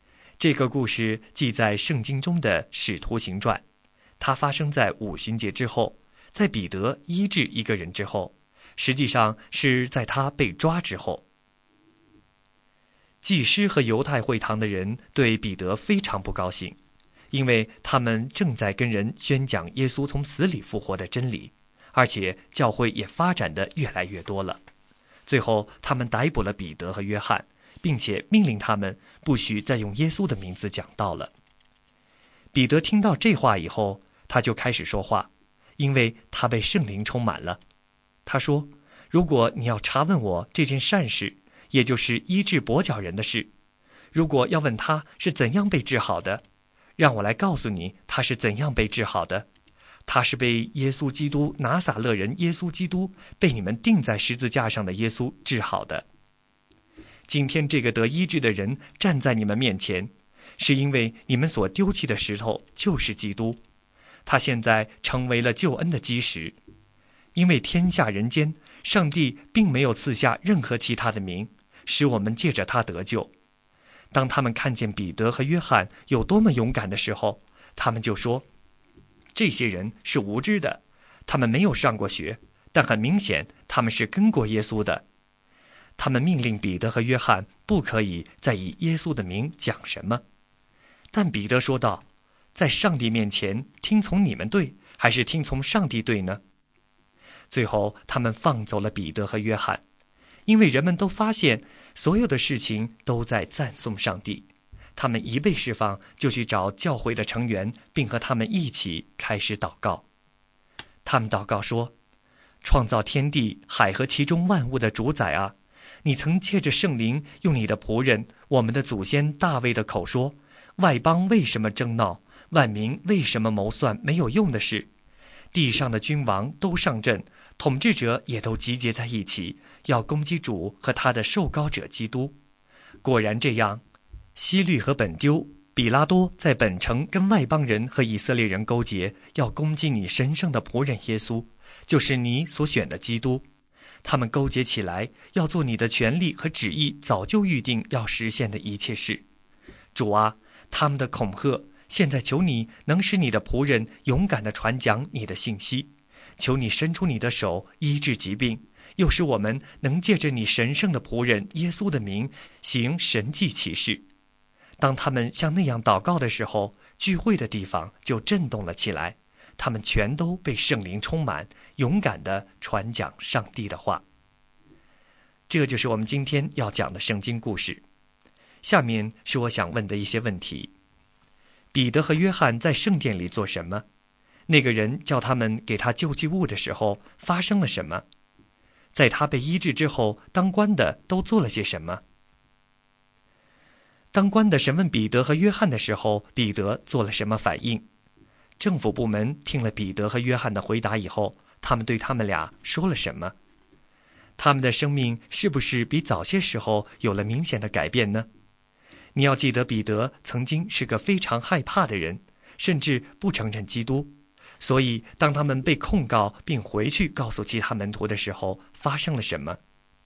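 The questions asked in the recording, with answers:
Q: 当官的审问彼得和约翰的时候,彼得做了什么反应?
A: 他被圣灵充满,勇敢地说那人是靠拿撒勒人耶稣基督的名得医治的

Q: 政府部门听了彼得和约翰的回答以后,他们对他们俩说了什么?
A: 命令他们不可以再以耶稣的名讲什么

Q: 所以当他们被控告并回去告诉其他门徒的时候,发生了什么?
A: 他们一起祷告,聚会的地方震动,他们都被圣灵充满,勇敢地传讲上帝的话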